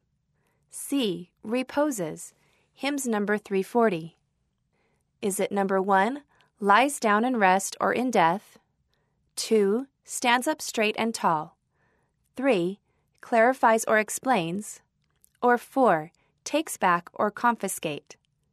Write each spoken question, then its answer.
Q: reposes, Hymns Number 340.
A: The answer is 1, lies down in rest or in death.